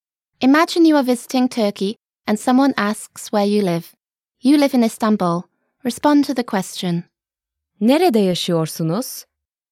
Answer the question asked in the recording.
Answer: İstanbul'da yaşıyorum.